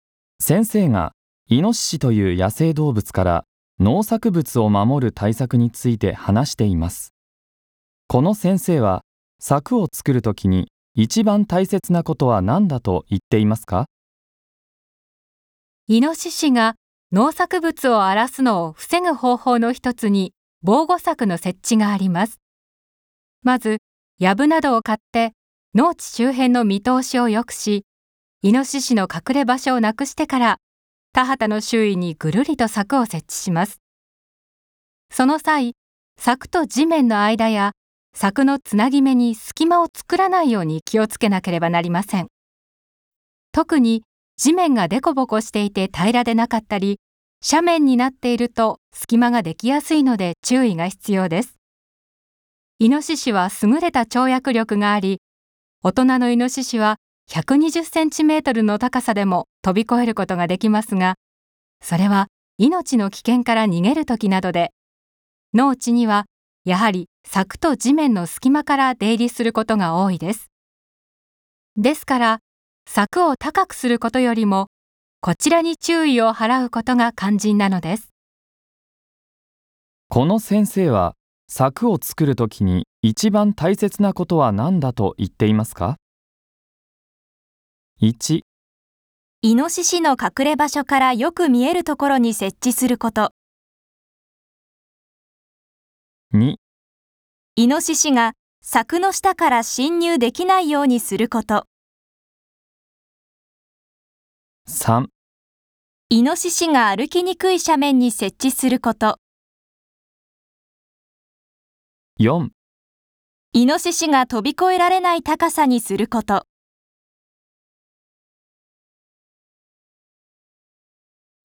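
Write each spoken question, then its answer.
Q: この先生は、柵を作るときに一番大切なことは何だと言っていますか?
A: 2: イノシシが柵の下から侵入できないようにすること。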